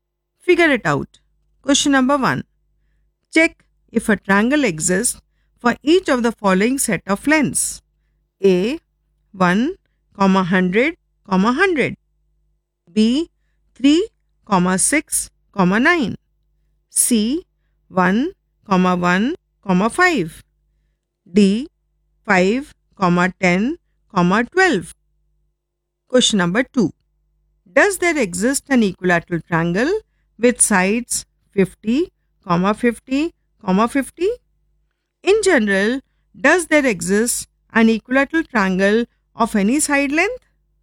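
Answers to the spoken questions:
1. A: 1, 100, 100 and D: 5, 10, 12 exist; B and C do not
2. Yes; an equilateral triangle exists for any side length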